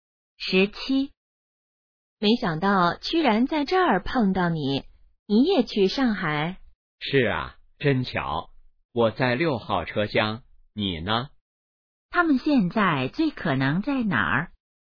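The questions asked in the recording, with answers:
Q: 他们现在最可能在哪儿?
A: 火车上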